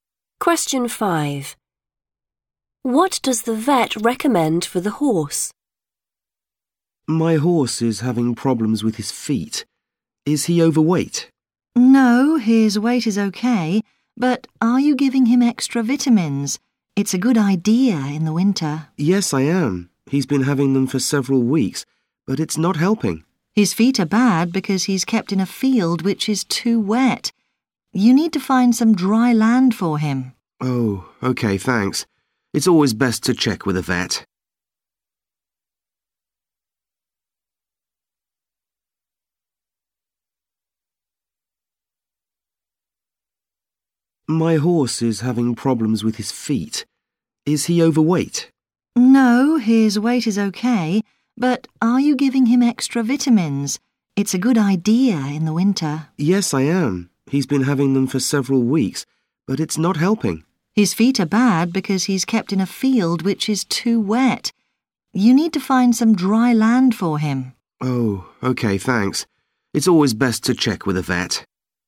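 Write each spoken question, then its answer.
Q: What does the vet recommend for the horse?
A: find some dry land for him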